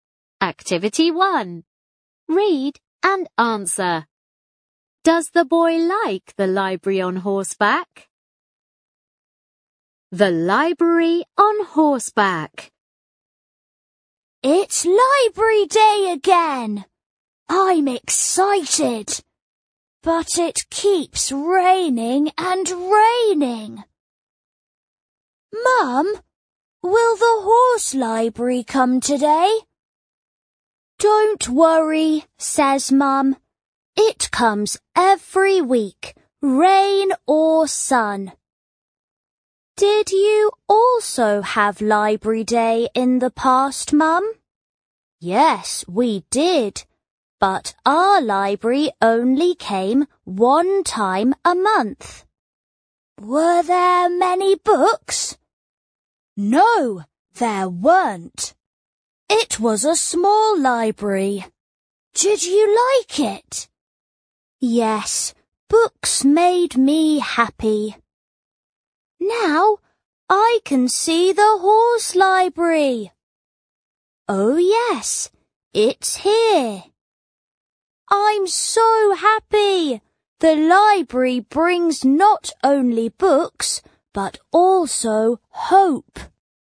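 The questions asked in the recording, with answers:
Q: Does the boy like the library on horseback?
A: Yes, he does.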